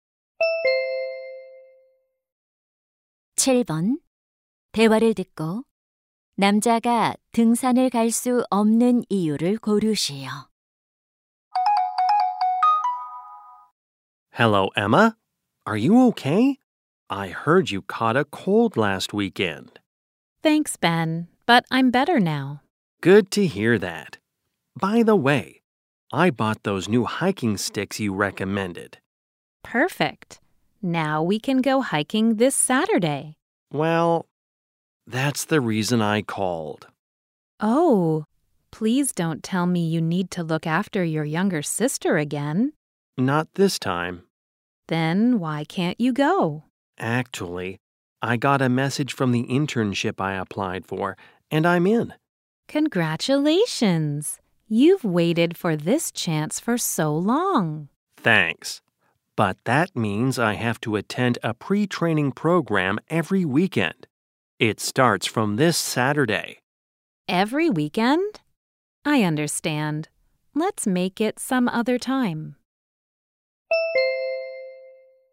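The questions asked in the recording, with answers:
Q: 남자가 등산을 갈 수 없는 이유를 고르시오.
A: 인턴십 사전 교육 프로그램에 참석해야 해서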